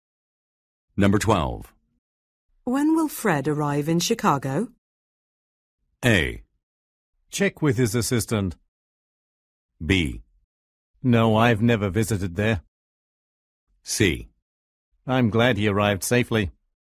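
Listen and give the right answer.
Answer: A: Check with his assistant.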